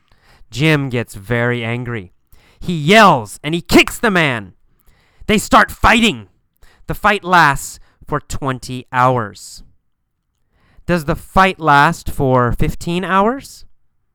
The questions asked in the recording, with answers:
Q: Does the fight last for 15 hours?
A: No, it does not last for 15 hours.